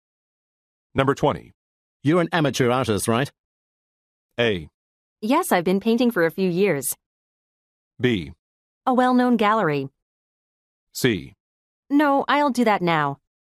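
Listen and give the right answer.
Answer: A: Yes, I've been painting for a few years.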